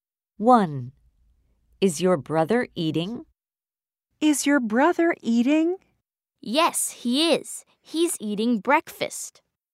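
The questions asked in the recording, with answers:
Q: Is your brother eating?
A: Yes, he's eating breakfast.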